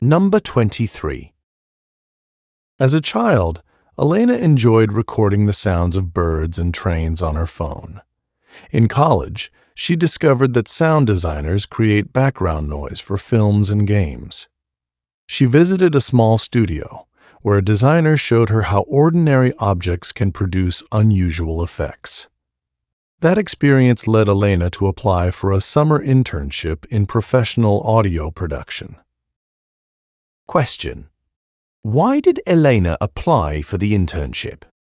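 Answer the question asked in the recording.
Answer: Because visiting a small studio, where a designer showed her how ordinary objects can make unusual sound effects, inspired her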